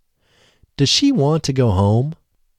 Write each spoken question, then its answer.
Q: Does she want to go home?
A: No, she doesn't want to go home.